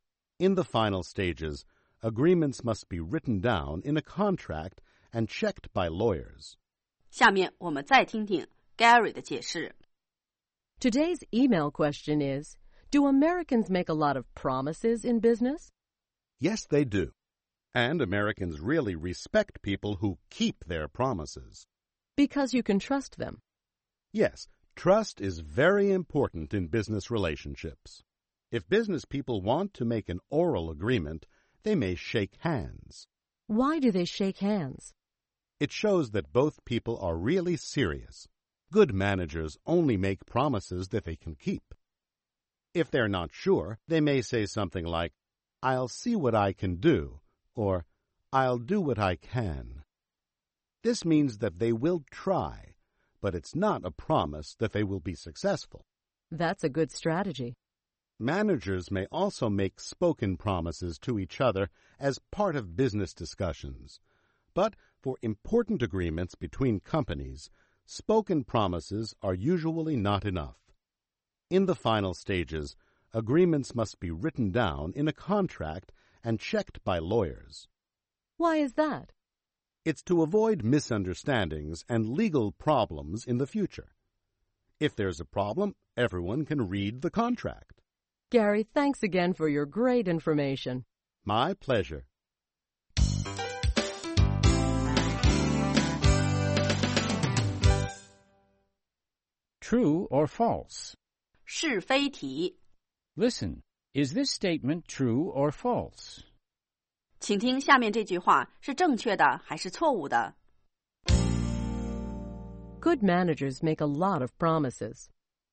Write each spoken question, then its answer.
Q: Good managers make a lot of promises.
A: False. Good managers only make promises that they can keep.